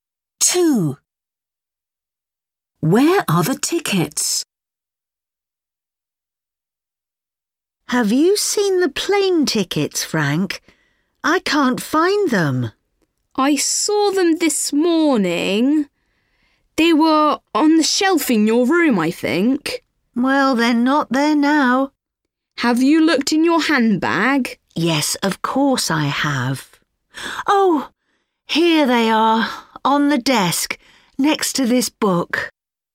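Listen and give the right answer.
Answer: On the desk, next to the book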